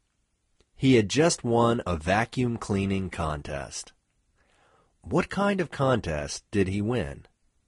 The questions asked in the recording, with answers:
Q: What kind of contest did he win?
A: He won a vacuum cleaning contest.